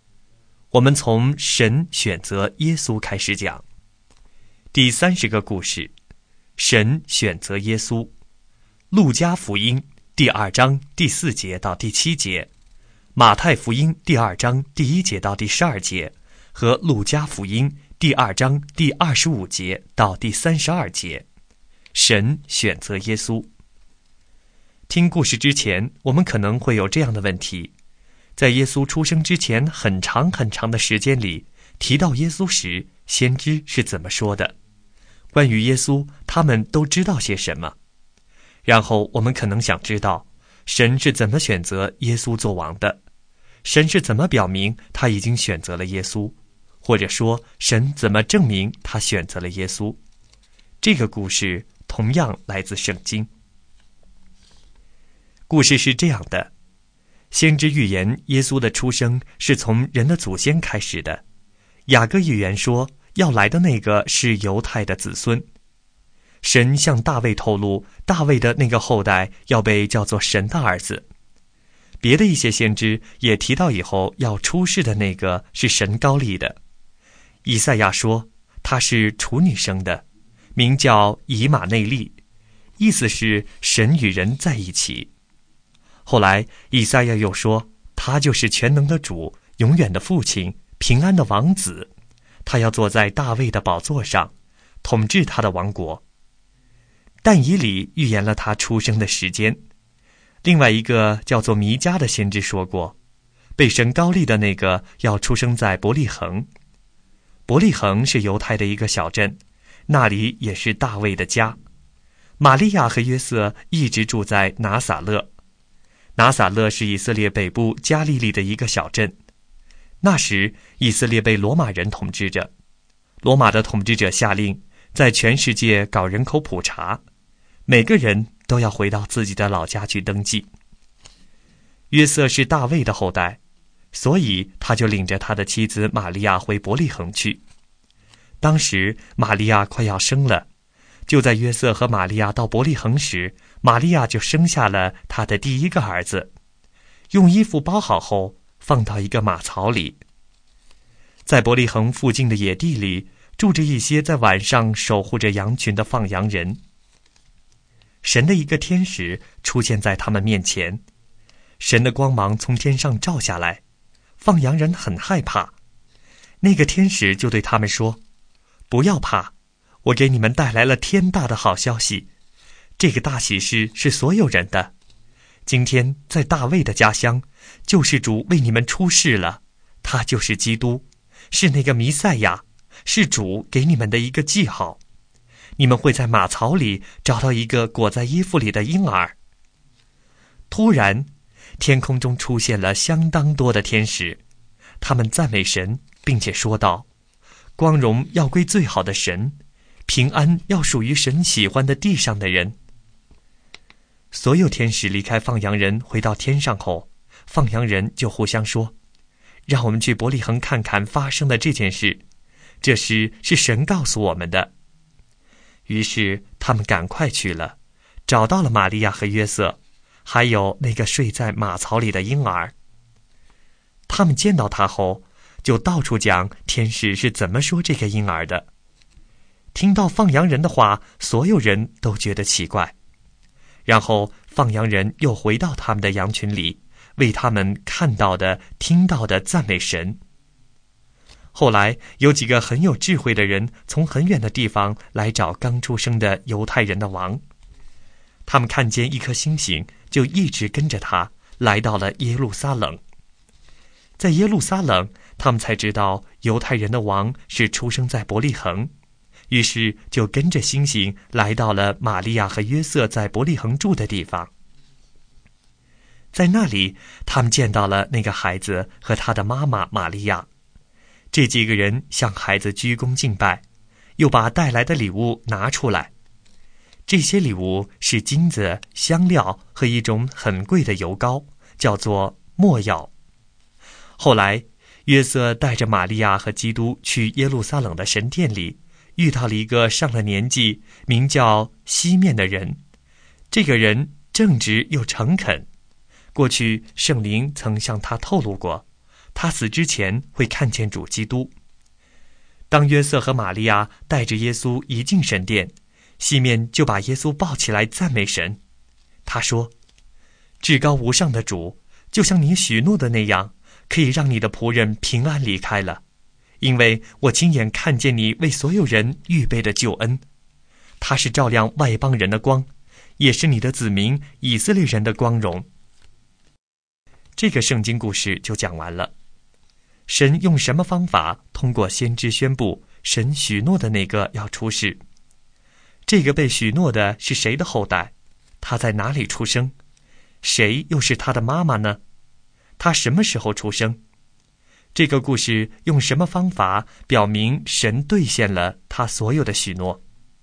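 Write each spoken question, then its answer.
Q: 这个被许诺的是谁的后代?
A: 大卫的后代(犹大的子孙)

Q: 他在哪里出生?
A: 伯利恒

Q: 谁又是他的妈妈呢?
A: 玛利亚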